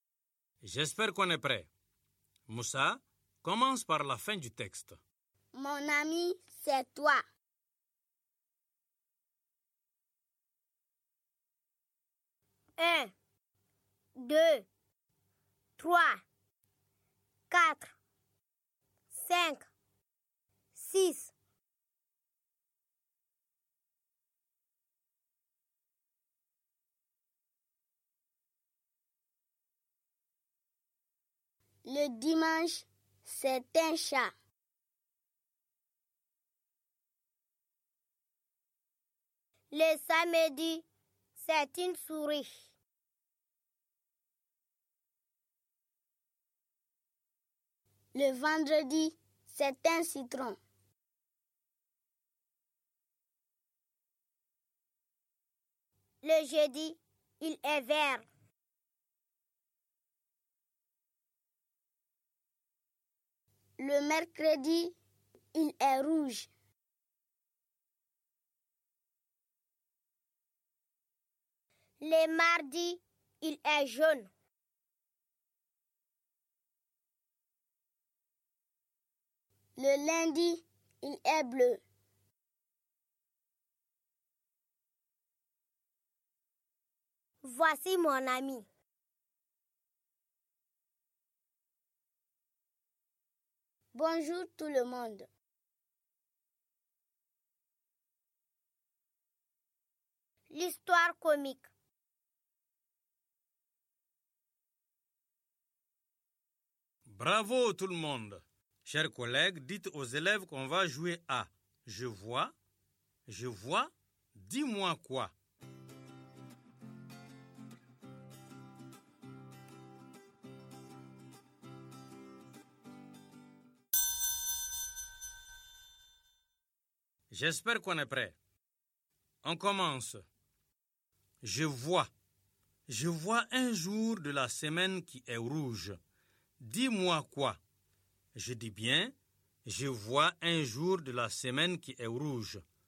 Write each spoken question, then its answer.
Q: Je vois. Je vois un jour de la semaine qui est rouge.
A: Monsieur, c'est mercredi.